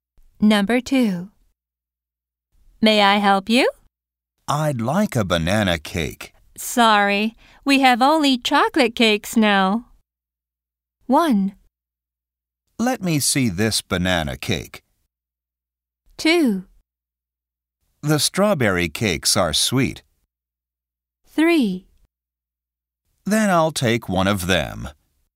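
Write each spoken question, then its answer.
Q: Sorry, we have only chocolate cakes now.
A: 3: Then I'll take one of them.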